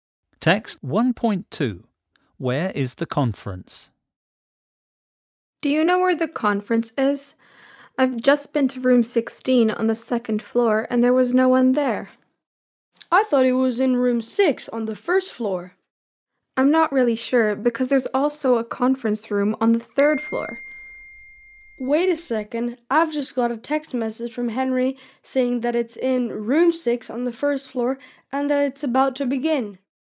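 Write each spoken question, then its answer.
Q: Where is the conference?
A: Room 6 on the 1st floor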